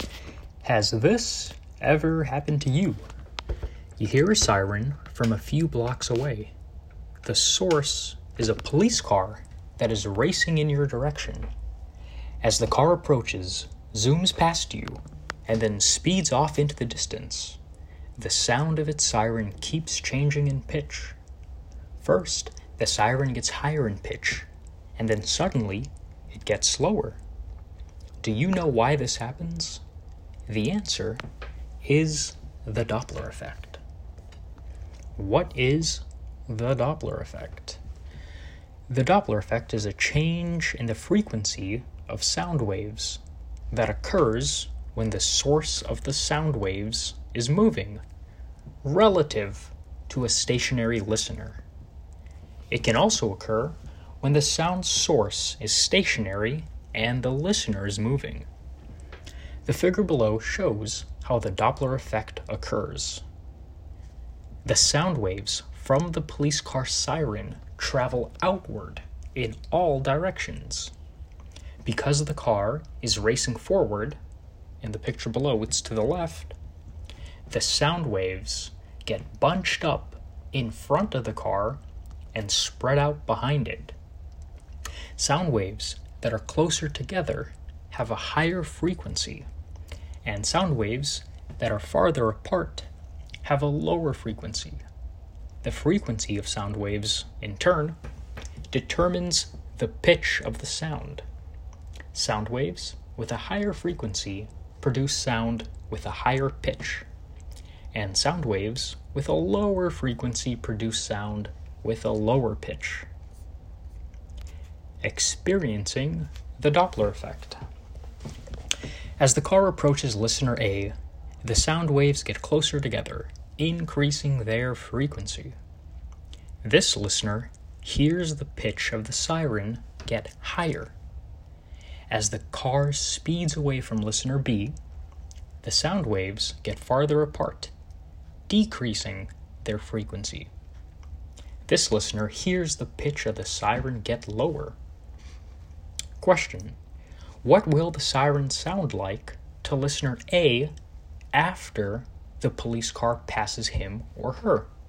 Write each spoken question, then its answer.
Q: what will the siren sound like to listener A after the police car passes him or her?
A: the siren will suddenly get lower in pitch because the sound waves will be much more spread out and have a lower frequency.